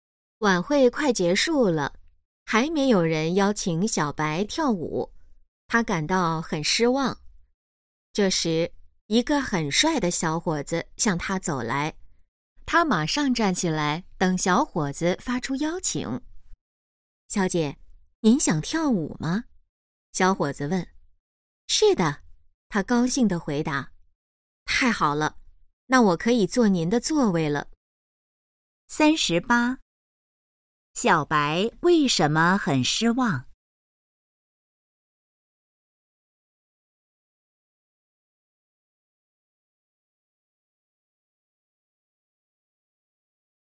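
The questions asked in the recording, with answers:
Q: 小白为什么很失望?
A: 没有人邀请她跳舞

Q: 小伙子想要做什么?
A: 坐她的座位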